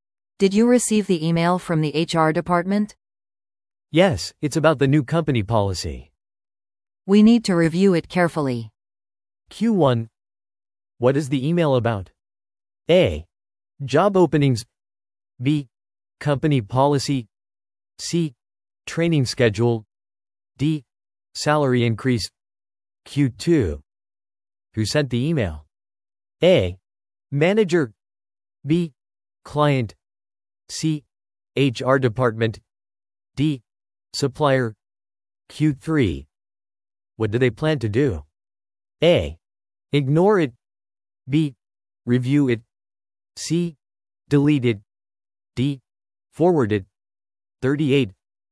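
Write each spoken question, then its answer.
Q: What is the email about?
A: B: Company policy.

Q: Who sent the email?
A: C: HR department.

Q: What do they plan to do?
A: B: Review it.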